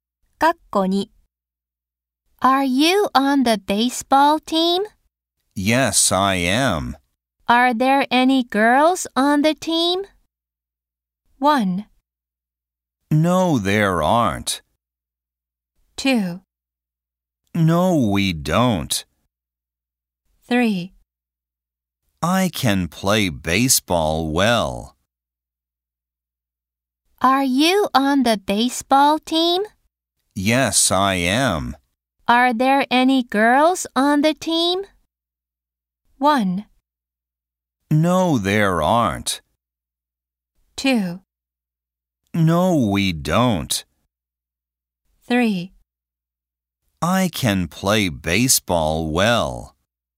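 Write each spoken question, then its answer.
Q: Are there any girls on the team?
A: 1: No, there aren't.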